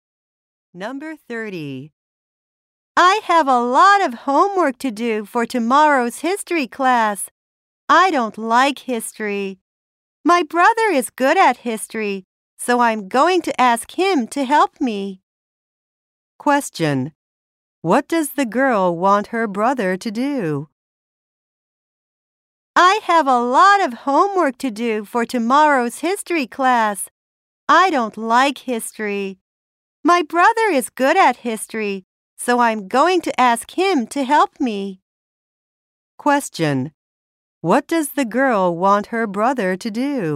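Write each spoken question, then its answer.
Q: What does the girl want her brother to do?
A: Help her with her history homework.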